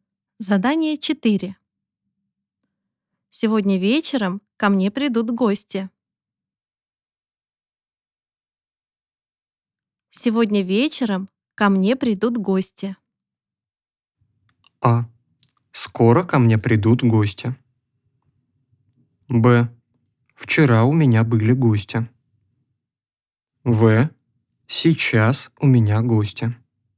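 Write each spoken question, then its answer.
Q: Сегодня вечером ко мне придут гости.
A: А: Скоро ко мне придут гости.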